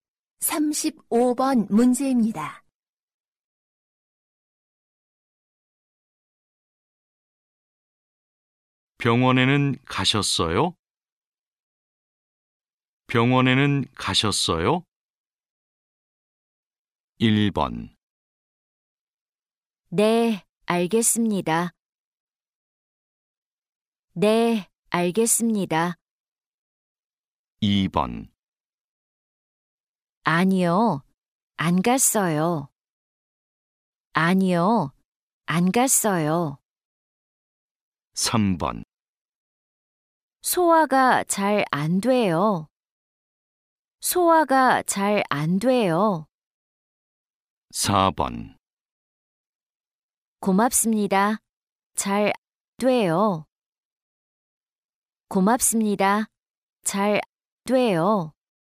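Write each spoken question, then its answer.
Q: 병원에는 가셨어요?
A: 2: 아니요, 안 갔어요.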